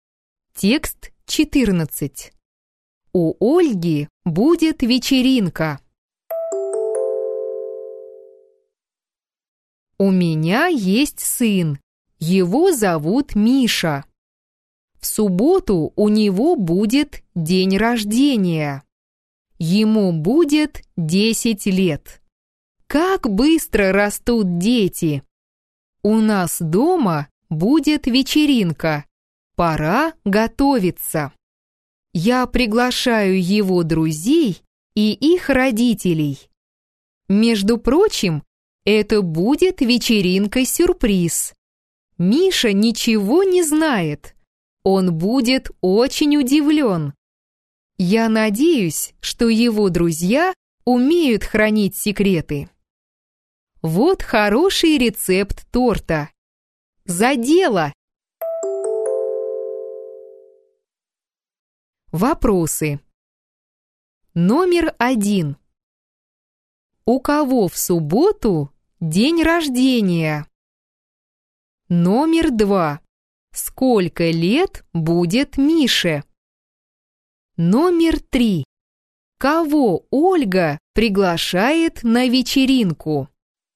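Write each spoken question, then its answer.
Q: У кого в субботу день рождения?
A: У Миши, сына Ольги

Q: Сколько лет будет Мише?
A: 10 лет

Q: Кого Ольга приглашает на вечеринку?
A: Друзей Миши и их родителей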